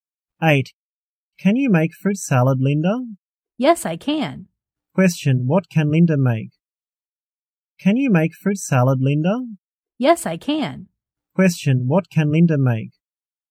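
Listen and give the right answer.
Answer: Fruit salad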